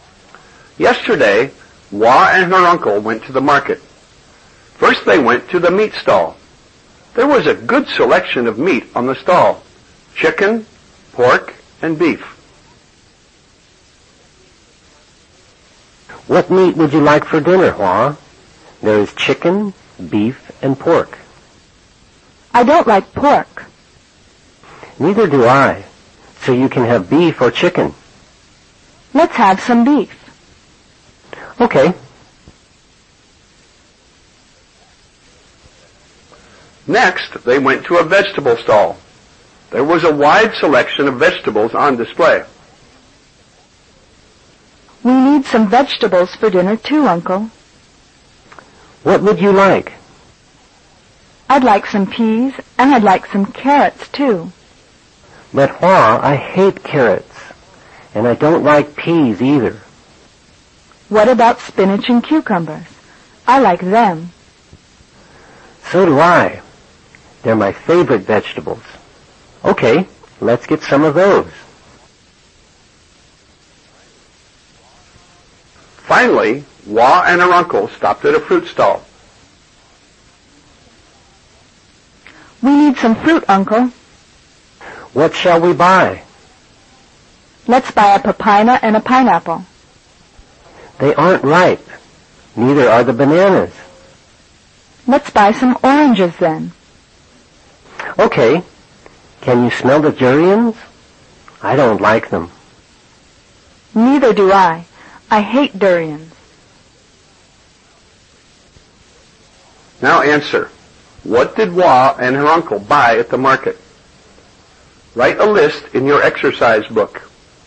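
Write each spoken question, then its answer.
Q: What did Hua and her uncle buy at the market?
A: Beef, spinach, cucumbers and oranges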